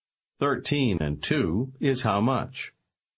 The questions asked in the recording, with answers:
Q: Thirteen and two is how much?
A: Fifteen.